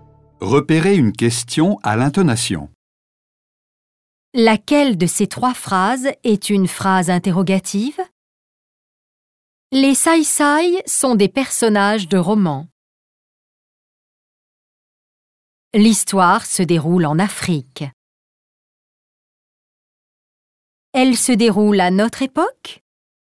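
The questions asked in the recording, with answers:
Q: Laquelle de ces trois phrases est une phrase interrogative?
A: La troisième : « Elle se déroule à notre époque? »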